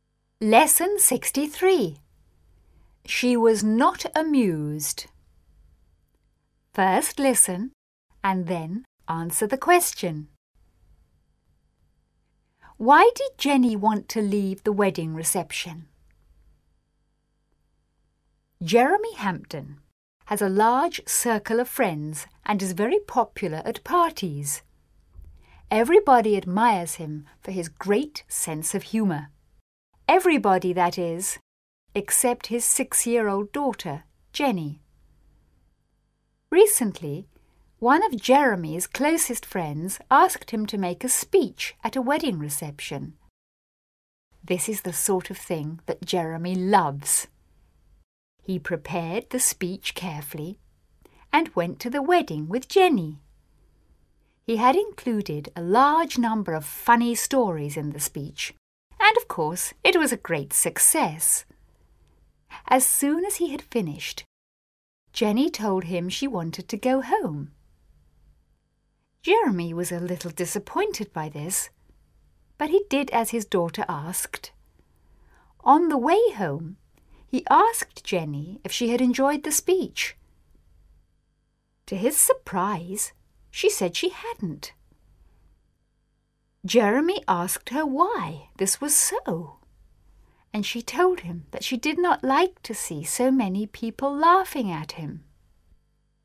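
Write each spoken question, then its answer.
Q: Why did Jenny want to leave the wedding reception?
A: She did not like to see so many people laughing at her father.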